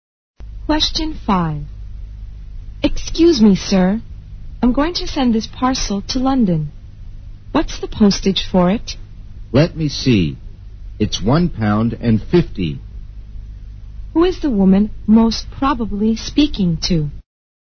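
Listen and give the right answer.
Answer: A post office clerk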